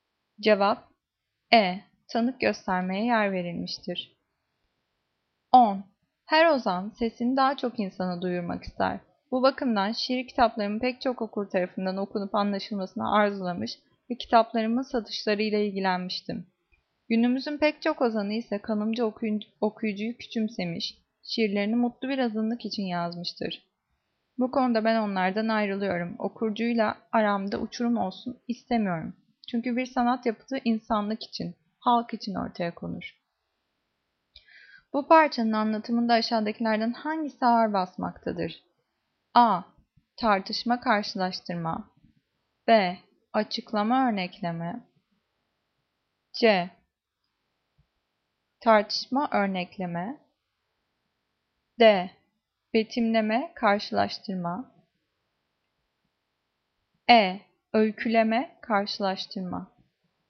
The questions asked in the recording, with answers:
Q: Bu parçanın anlatımında aşağıdakilerden hangisi ağır basmaktadır?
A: Cevap A. Tartışma karşılaştırma.